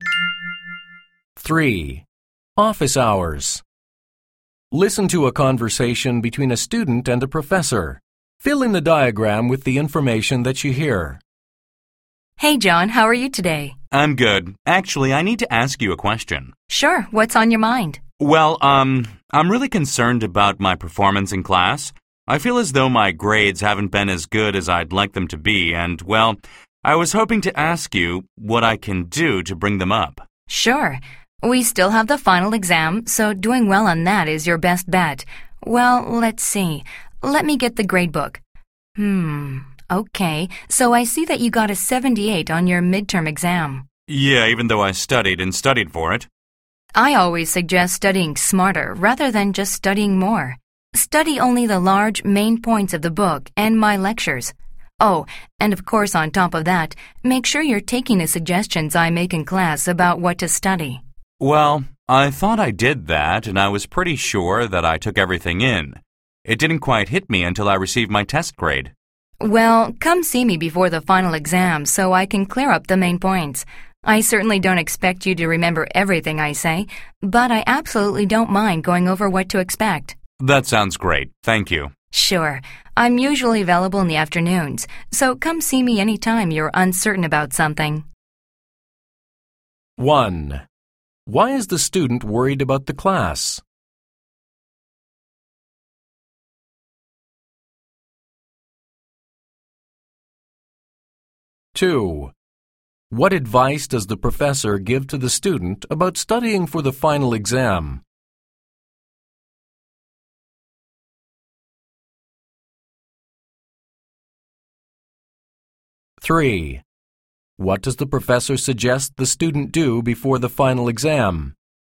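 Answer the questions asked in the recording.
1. His grades are not as good as he'd like (he got 78 on the midterm)
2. Study smarter: focus on the main points of the book and lectures and follow the professor's suggestions
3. Come see the professor to go over the main points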